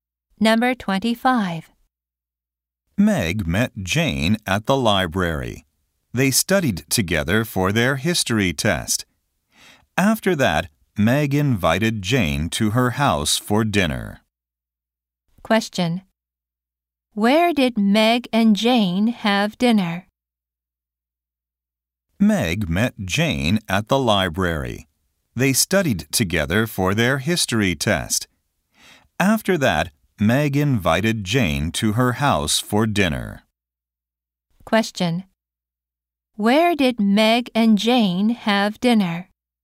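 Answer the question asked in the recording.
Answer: At Meg's house.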